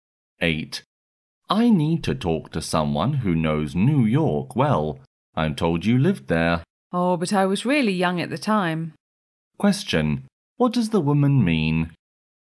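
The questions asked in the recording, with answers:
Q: What does the woman mean?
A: She doesn't know New York well, because she was very young when she lived there.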